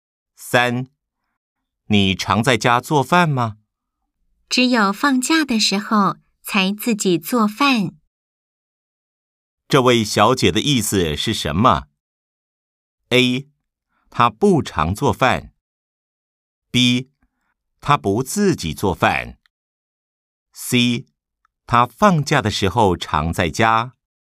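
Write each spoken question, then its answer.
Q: 这位小姐的意思是什么? A. 她不常做饭。 B. 她不自己做饭。 C. 她放假的时候常在家。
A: A: 她不常做饭。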